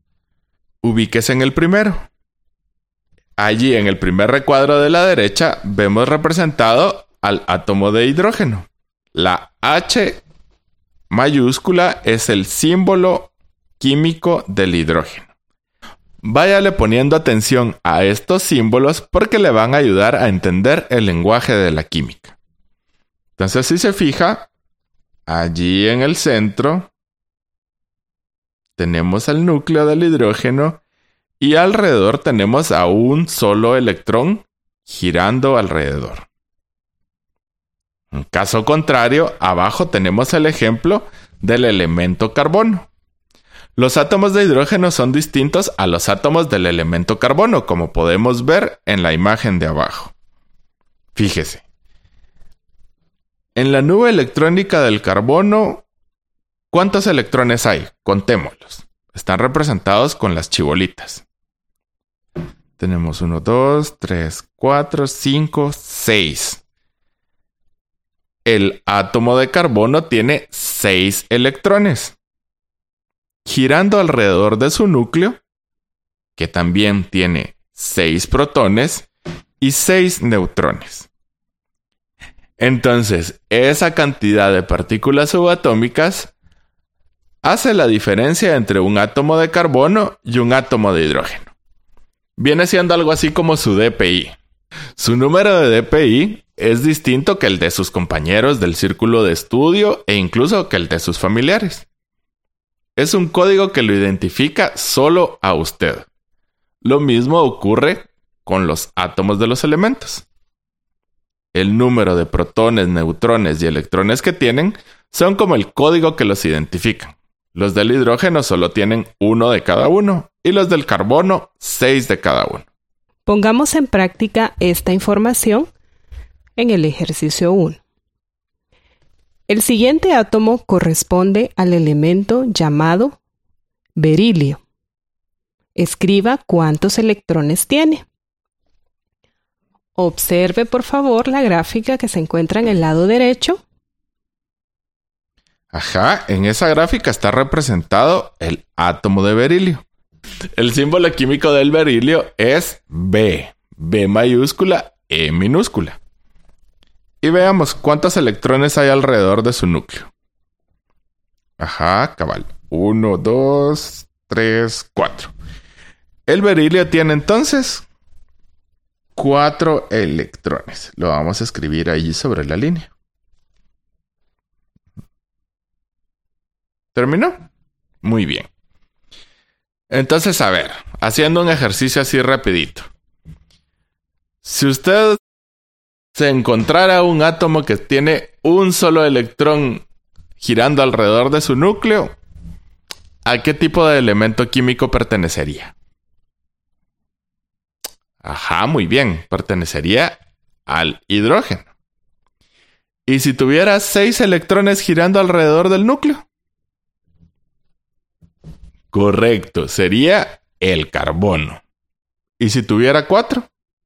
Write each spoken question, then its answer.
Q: Si usted se encontrara un átomo que tiene un solo electrón girando alrededor de su núcleo, ¿a qué tipo de elemento químico pertenecería?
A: Ajá, muy bien, pertenecería al hidrógeno.

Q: ¿Y si tuviera 4?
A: Cabal, ¿verdad? El berilio, que es el que acaba de identificar.